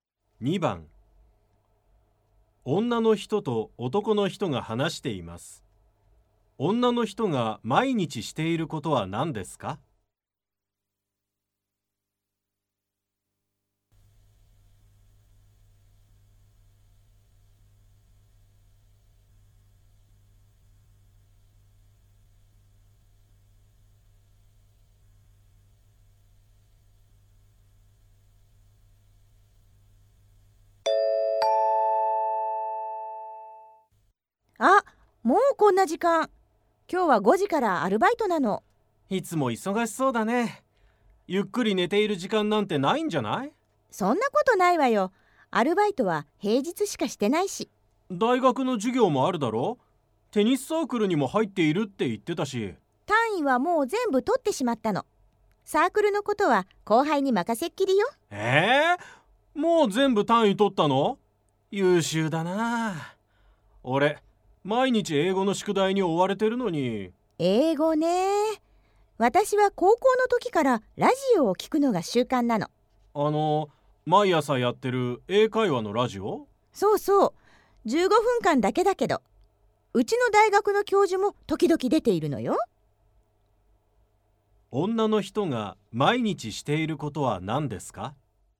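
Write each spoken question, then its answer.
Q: 女の人が毎日していることは何ですか?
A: 英会話のラジオを聞くこと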